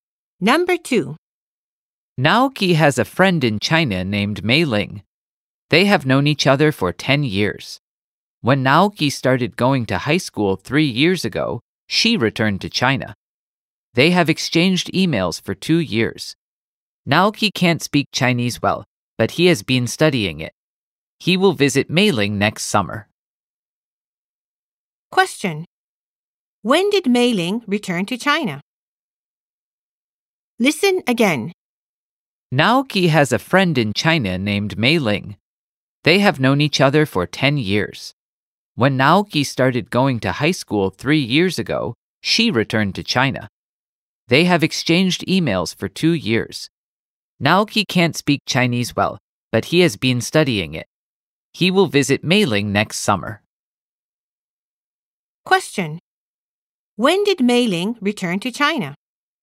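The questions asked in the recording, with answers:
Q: When did Mei Ling return to China?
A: Three years ago, when Naoki started high school.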